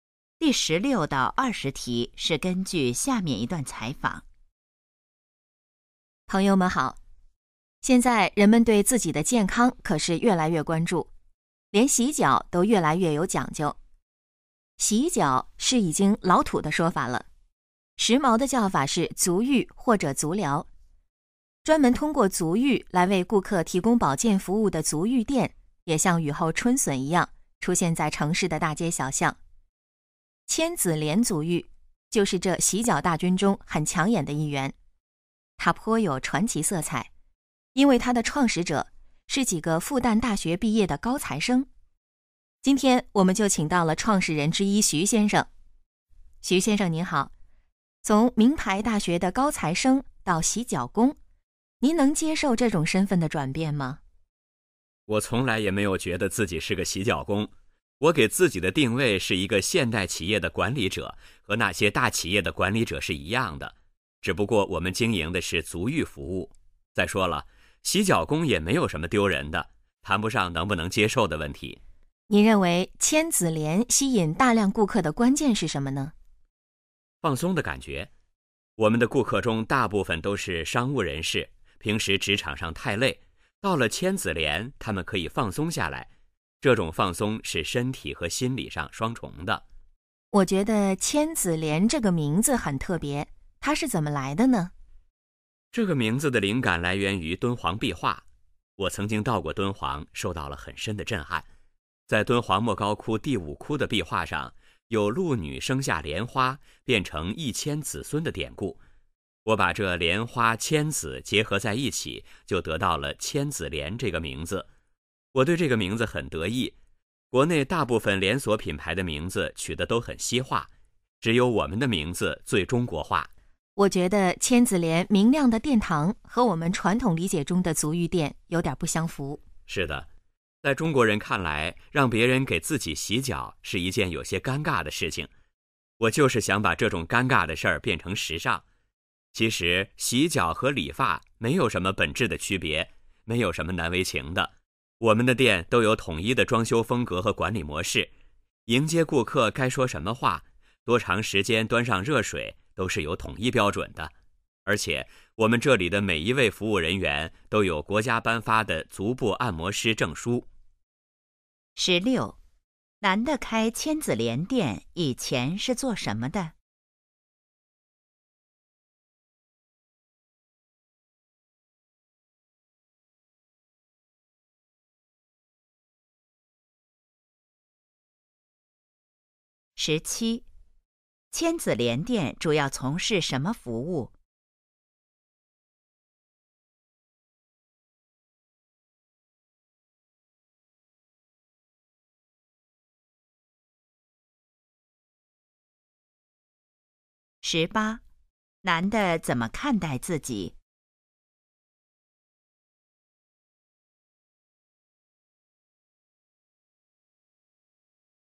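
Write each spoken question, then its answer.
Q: 男的开千子莲店以前是做什么的?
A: 复旦大学毕业的高材生(学生)

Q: 千子莲店主要从事什么服务?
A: 足浴服务

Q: 男的怎么看待自己?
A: 现代企业的管理者

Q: 千子莲这个名字来自什么?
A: 敦煌壁画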